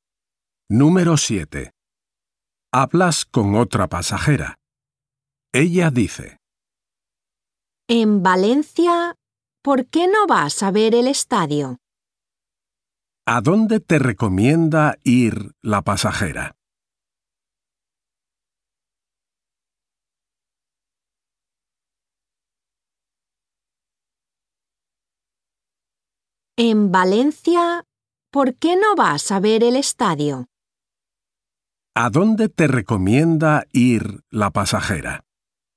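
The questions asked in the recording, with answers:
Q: ¿A dónde te recomienda ir la pasajera?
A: Al estadio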